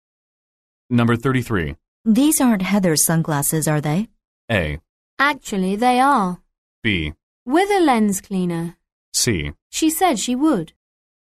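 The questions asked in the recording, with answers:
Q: These aren't Heather's sunglasses, are they?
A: A: Actually, they are.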